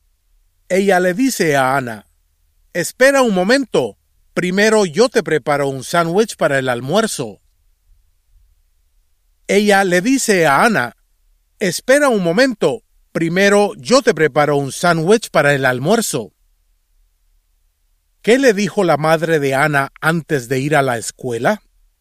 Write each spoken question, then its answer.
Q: ¿Qué le dijo la madre de Ana antes de ir a la escuela?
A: Su madre le dijo, «Espera un momento.